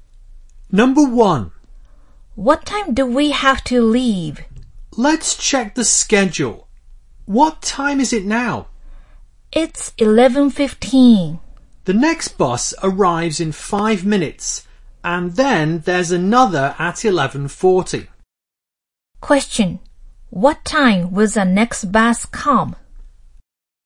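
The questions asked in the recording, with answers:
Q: What time will the next bus come?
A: 11:20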